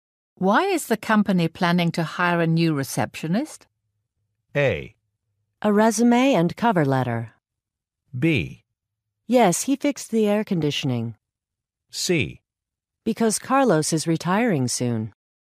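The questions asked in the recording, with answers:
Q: Why is the company planning to hire a new receptionist?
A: C: Because Carlos is retiring soon.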